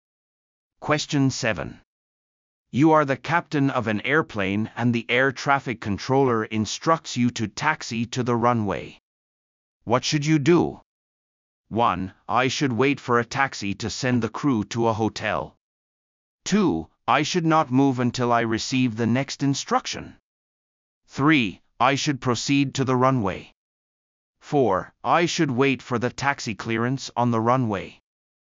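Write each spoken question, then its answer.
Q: What should you do?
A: 3: I should proceed to the runway.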